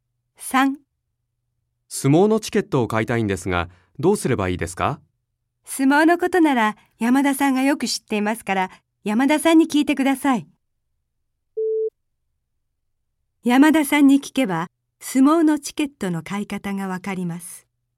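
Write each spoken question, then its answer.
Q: 山田さんに聞けば、相撲のチケットの買い方がわかります。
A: ○(正しい)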